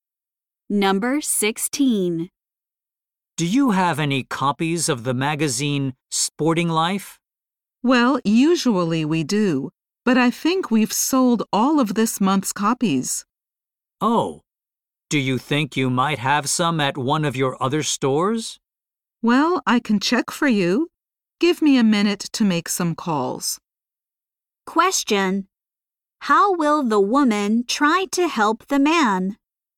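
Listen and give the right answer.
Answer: By calling other stores to check for the magazine.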